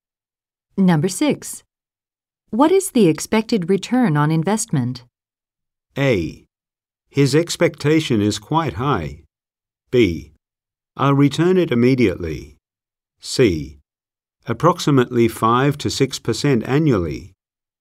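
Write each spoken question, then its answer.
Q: What is the expected return on investment?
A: C: Approximately 5 to 6% annually.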